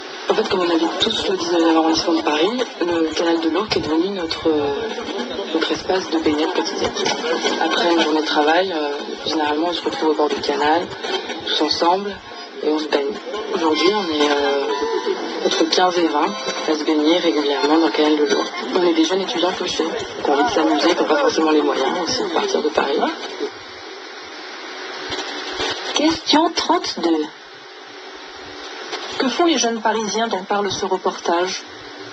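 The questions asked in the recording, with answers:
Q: Que font les jeunes parisiens dont parle ce reportage ?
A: Ils se baignent ensemble dans le canal de l'Ourcq après le travail.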